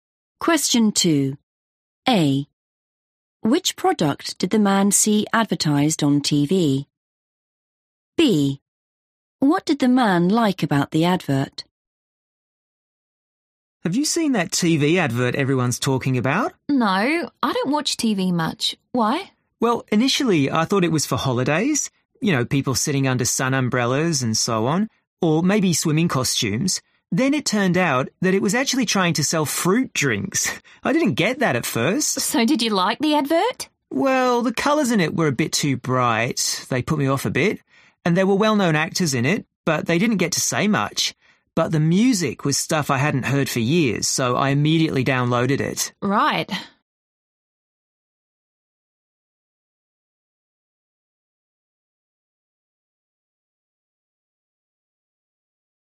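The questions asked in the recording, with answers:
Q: Which product did the man see advertised on TV?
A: fruit drinks

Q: What did the man like about the advert?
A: the music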